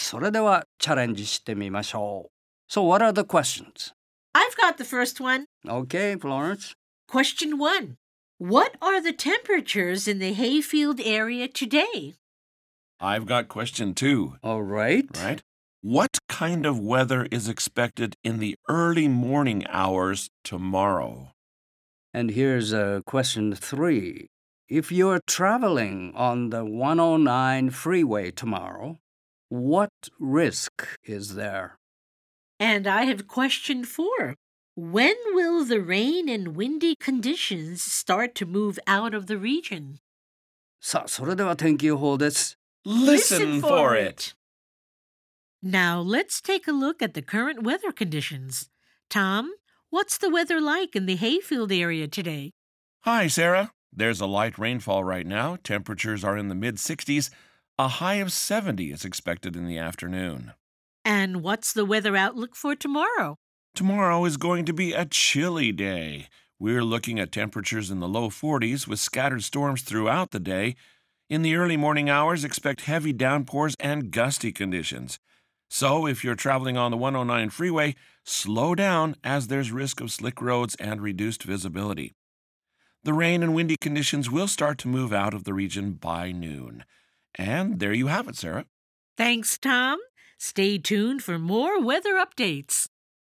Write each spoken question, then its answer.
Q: What are the temperatures in the hayfield area today?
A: Temperatures are in the mid-60s.

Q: What kind of weather is expected in the early morning hours tomorrow?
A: Heavy downpours and gusty conditions, so lots of wind.

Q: If you're traveling on the 109 freeway tomorrow, what risk is there?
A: Well, there's risk of slick roads and reduced visibility.

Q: When will the rain and windy conditions start to move out of the region?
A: By noon.